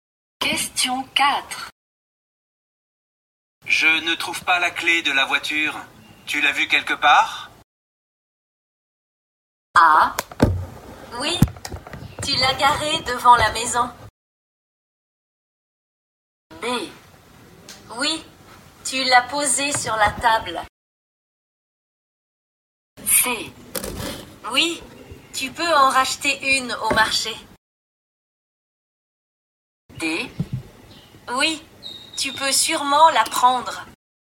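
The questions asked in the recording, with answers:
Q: Tu l'as vue quelque part?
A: B: Oui, tu l'as posée sur la table.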